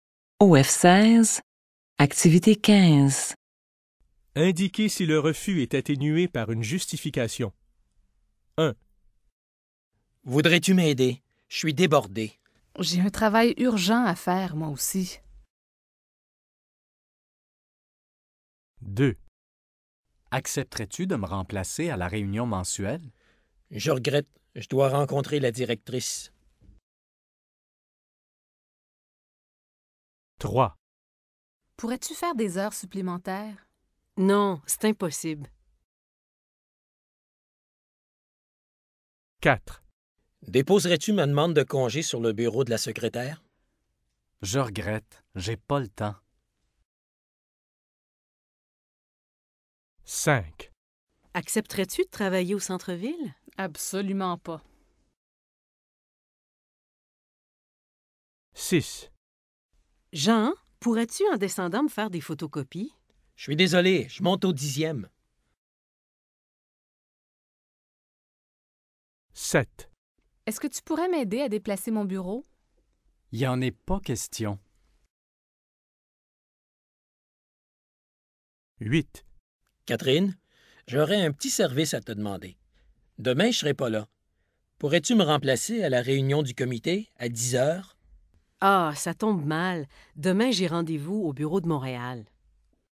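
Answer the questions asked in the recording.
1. Oui
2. Oui
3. Non
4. Oui
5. Non
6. Oui
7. Non
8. Oui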